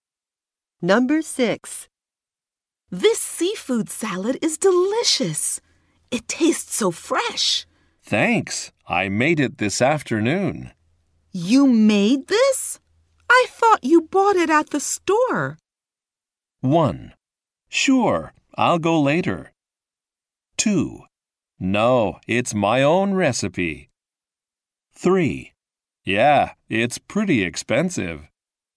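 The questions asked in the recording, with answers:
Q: You made this? I thought you bought it at the store.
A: 2: No, it's my own recipe.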